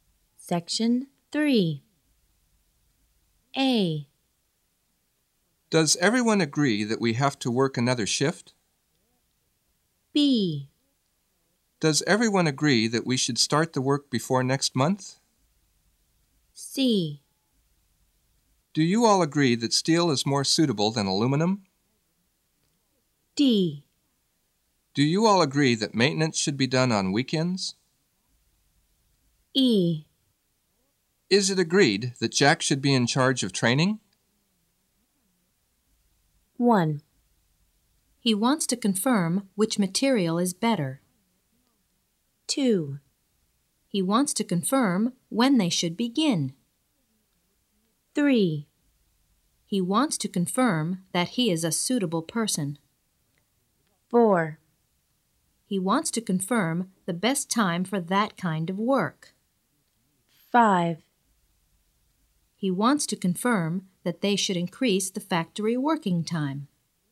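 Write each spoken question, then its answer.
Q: He wants to confirm which material is better.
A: C: Do you all agree that steel is more suitable than aluminum?

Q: He wants to confirm when they should begin.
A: B: Does everyone agree that we should start the work before next month?

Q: He wants to confirm that he is a suitable person.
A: E: Is it agreed that Jack should be in charge of training?

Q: He wants to confirm the best time for that kind of work.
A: D: Do you all agree that maintenance should be done on weekends?

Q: He wants to confirm that they should increase the factory working time.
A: A: Does everyone agree that we have to work another shift?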